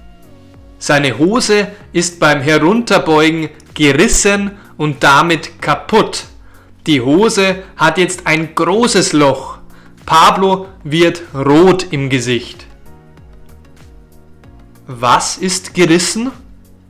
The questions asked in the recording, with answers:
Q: Was ist gerissen?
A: Die Hose. Pablos Hose ist beim Herunterbeugen gerissen.